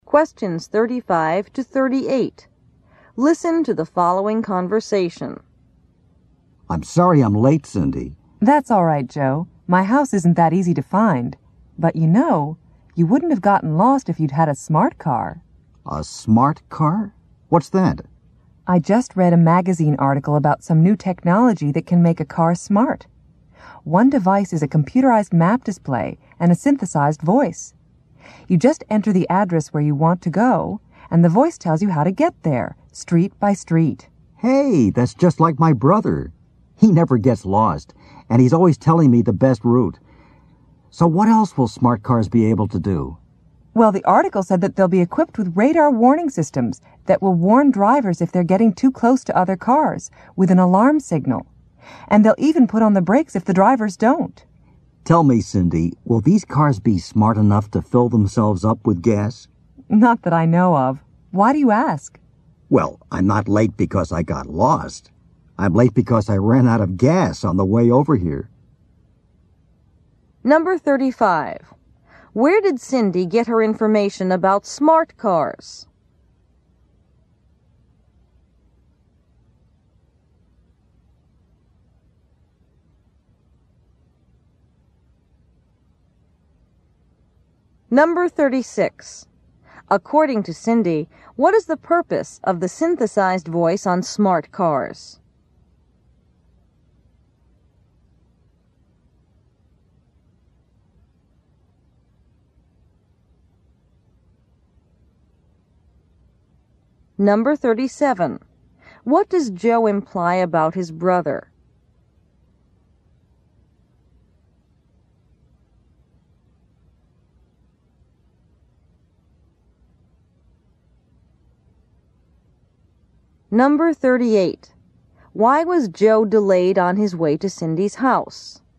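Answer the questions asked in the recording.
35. From a magazine article
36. To give drivers directions street by street
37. He is good with directions and likes telling Joe the best route
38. He ran out of gas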